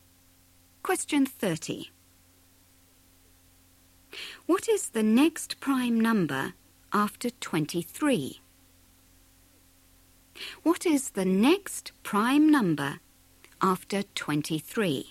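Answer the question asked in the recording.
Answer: 29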